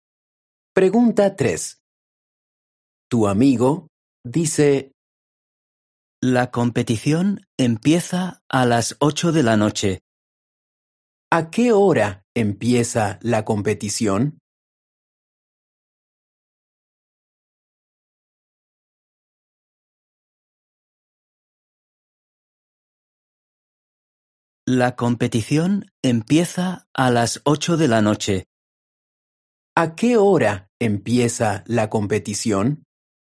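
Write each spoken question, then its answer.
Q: ¿A qué hora empieza la competición?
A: A las 8 de la noche.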